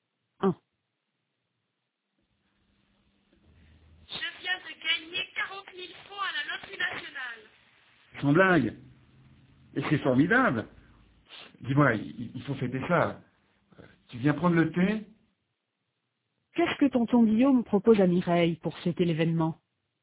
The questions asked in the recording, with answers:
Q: Qu'est-ce que tonton Guillaume propose à Mireille pour fêter l'événement?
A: Il lui propose de prendre le thé.